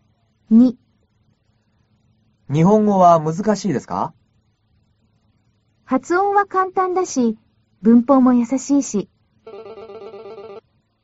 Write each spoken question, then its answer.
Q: 日本語は難しいですか?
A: 日本語は発音は簡単だし、文法も優しいし、難しくないです。